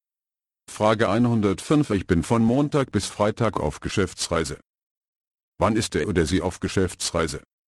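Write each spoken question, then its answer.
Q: Wann ist er oder sie auf Geschäftsreise?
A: von Montag bis Freitag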